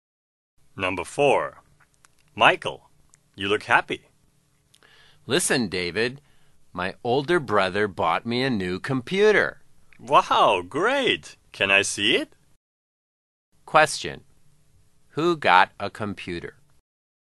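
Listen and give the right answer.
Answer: Michael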